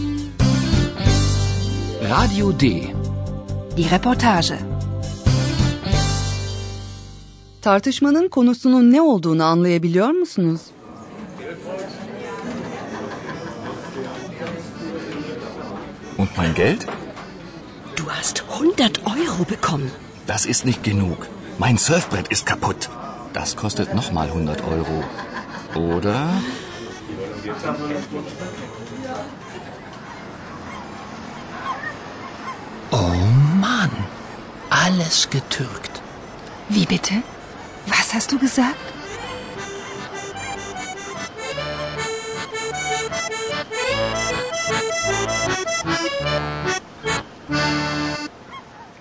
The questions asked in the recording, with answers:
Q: Tartışmanın konusunun ne olduğunu anlayabiliyor musunuz?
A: tartışma paracıklar hakkındaydı.